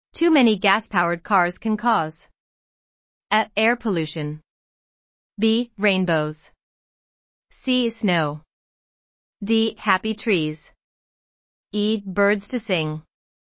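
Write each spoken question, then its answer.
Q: Too many gas-powered cars can cause A.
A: A: Air pollution.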